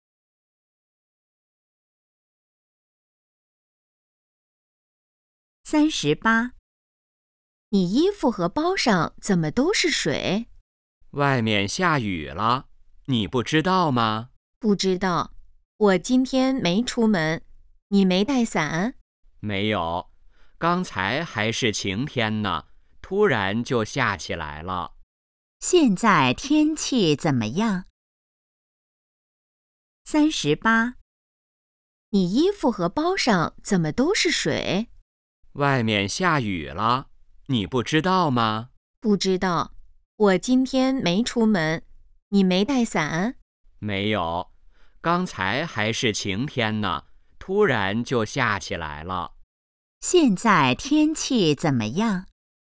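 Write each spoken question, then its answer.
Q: 现在天气怎么样?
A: 下雨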